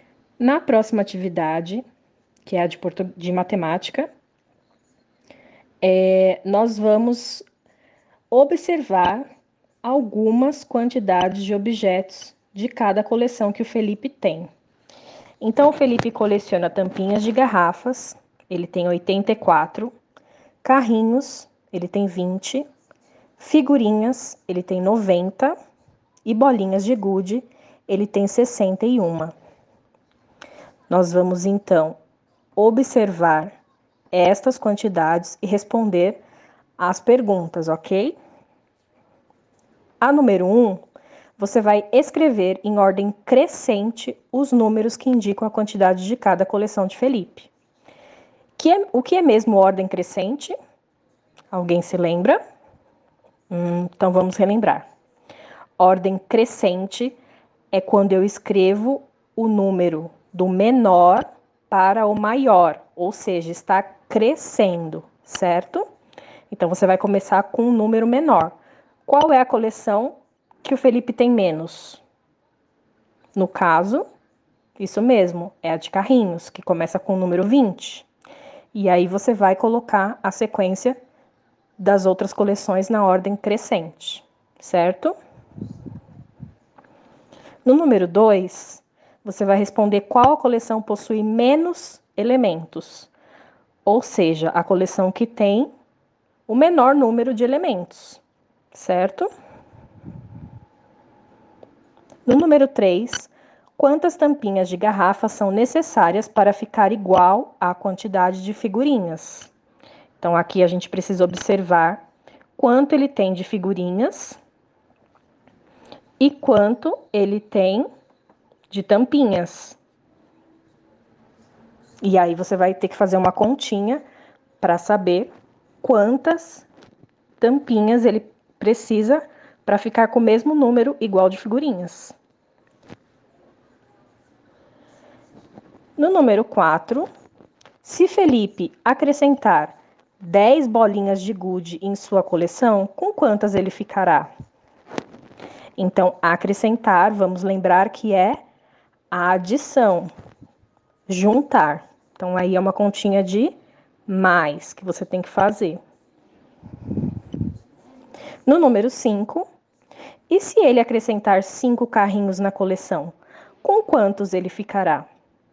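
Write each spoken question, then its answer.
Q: se Felipe acrescentar 10 bolinhas de gude em sua coleção, com quantas ele ficará?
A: 71

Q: e se ele acrescentar 5 carrinhos na coleção, com quantos ele ficará?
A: 25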